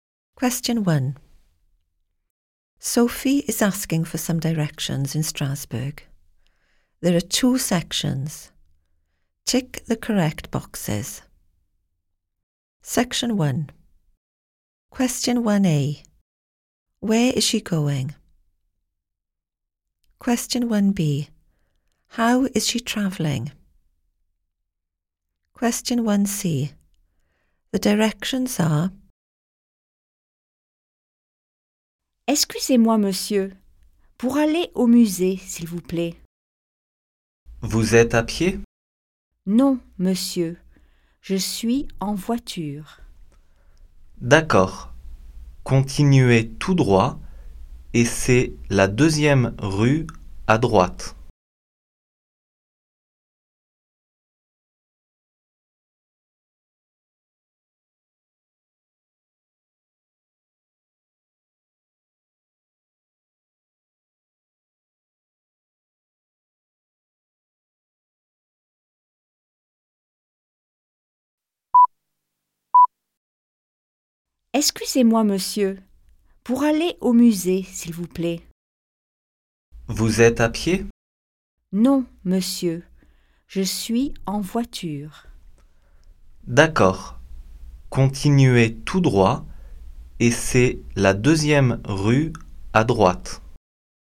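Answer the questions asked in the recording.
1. To the museum
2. By car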